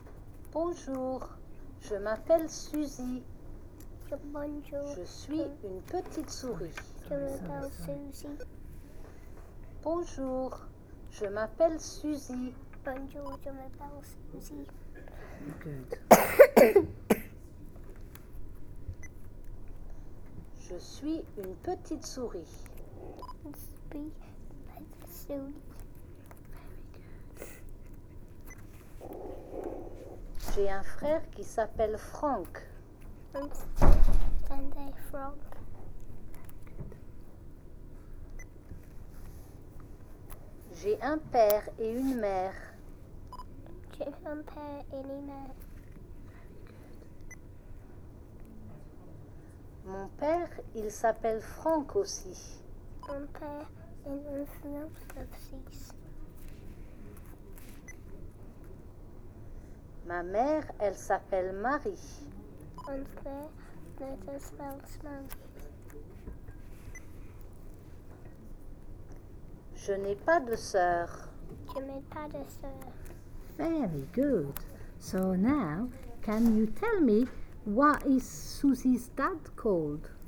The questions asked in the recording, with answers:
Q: So now, can you tell me what is Susie's dad called?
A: Oh, he's called Frank.